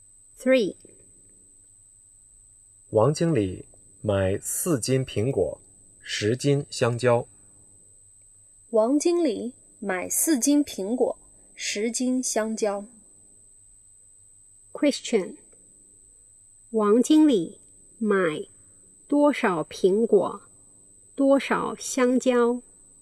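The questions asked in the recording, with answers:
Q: 王经理买多少苹果,多少香蕉?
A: 4斤苹果,10斤香蕉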